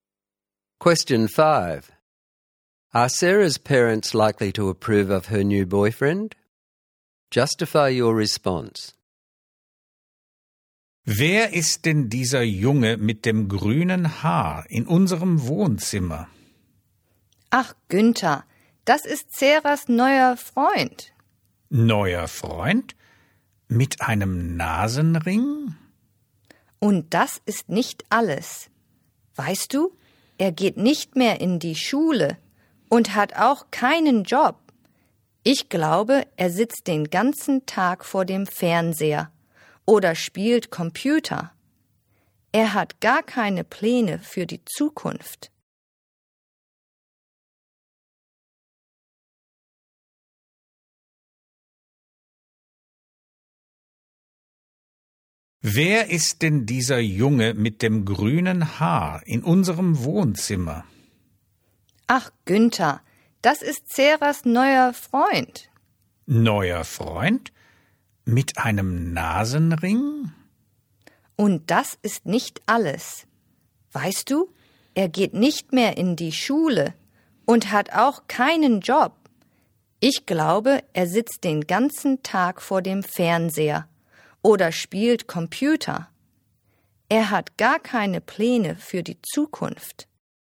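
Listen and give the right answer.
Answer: No: green hair, nose ring, left school, no job, watches TV/plays computer all day, no plans for the future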